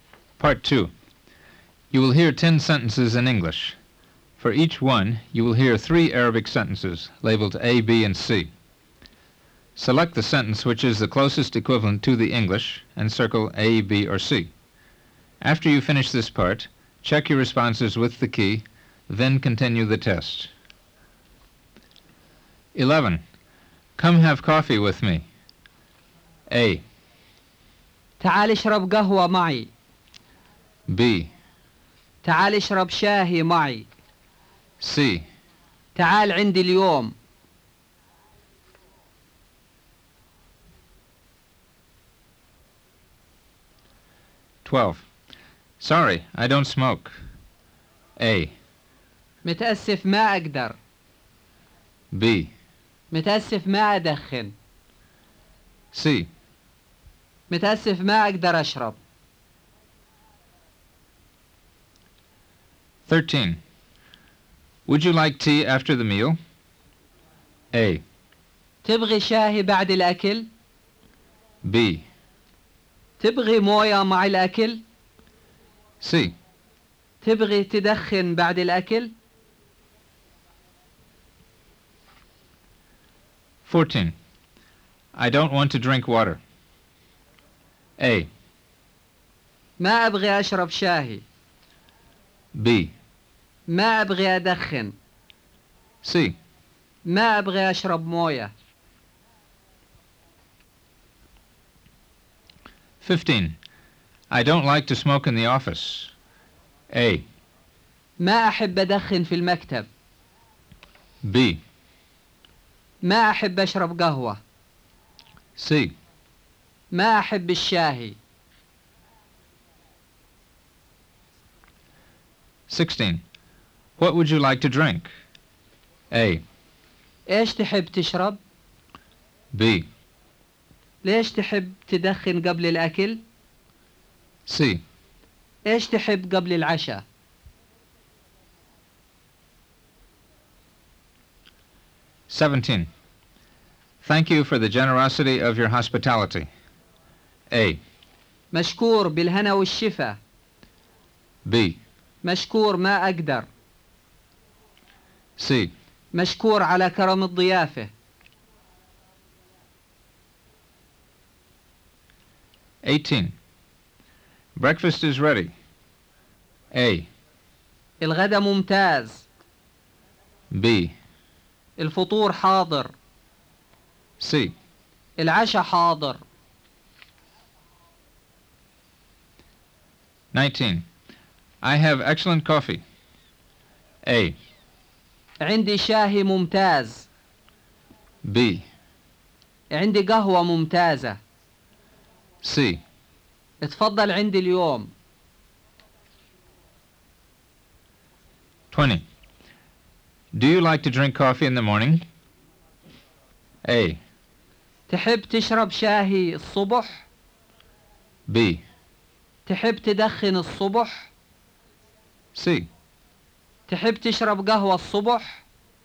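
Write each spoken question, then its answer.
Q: Come have coffee with me.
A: A: تعال اشرب قهوة معي.

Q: Sorry, I don't smoke.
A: B: متأسف ما أدخن.

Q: Would you like tea after the meal?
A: A: تبغي شاهي بعد الأكل؟

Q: I don't want to drink water.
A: C: ما أبغي أشرب موية.

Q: I don't like to smoke in the office.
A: A: ما أحب أدخن في المكتب.

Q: What would you like to drink?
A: A: إيش تحب تشرب؟

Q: Thank you for the generosity of your hospitality.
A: C: مشكور على كرم الضيافة.

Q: Breakfast is ready.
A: B: الفطور حاضر.

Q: I have excellent coffee.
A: B: عندي قهوة ممتازة.

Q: Do you like to drink coffee in the morning?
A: C: تحب تشرب قهوة الصبح؟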